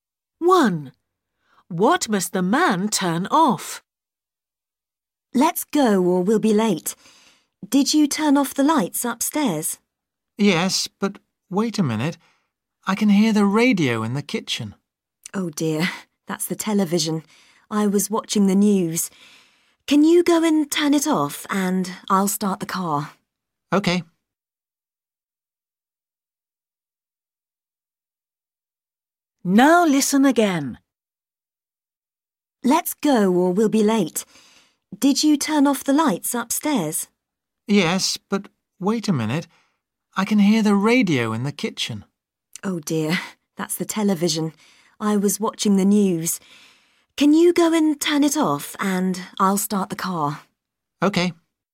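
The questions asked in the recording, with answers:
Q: What must the man turn off?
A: the television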